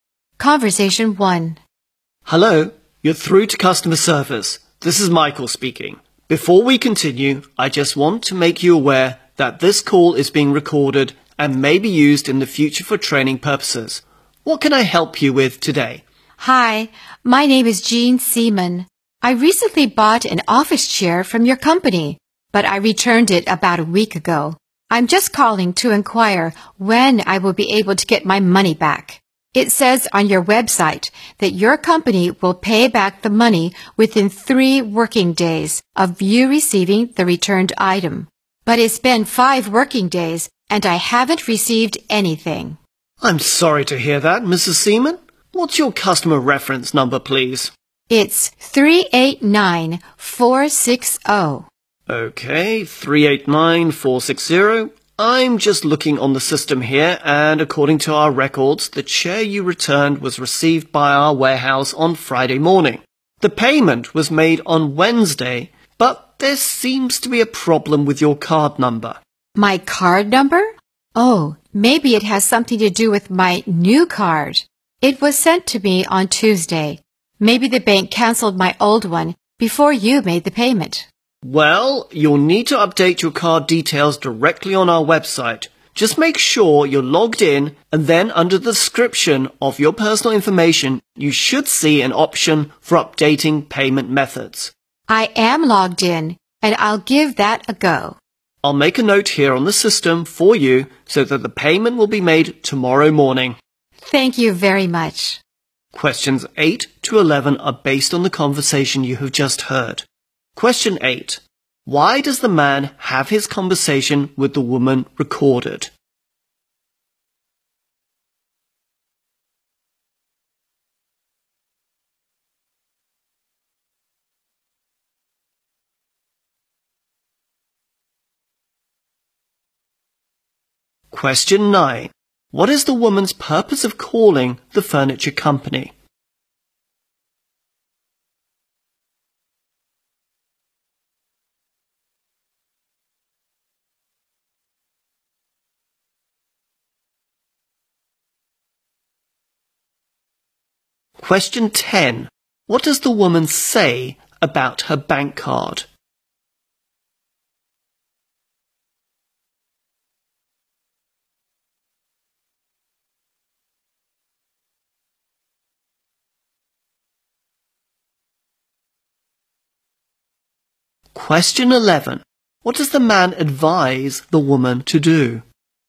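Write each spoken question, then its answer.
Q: Why does the man have his conversation with the woman recorded?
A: For future training purposes

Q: What is the woman's purpose of calling the furniture company?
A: To ask when she will get her refund for the returned chair

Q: What does the woman say about her bank card?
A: She got a new card and the old one may have been canceled

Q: What does the man advise the woman to do?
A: Update her card details on the website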